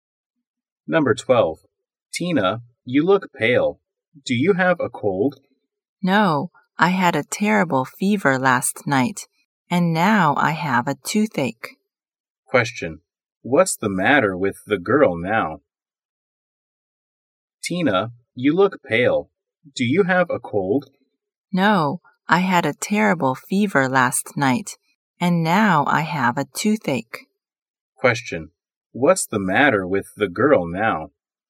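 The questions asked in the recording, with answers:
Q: what's the matter with the girl now?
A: She has a toothache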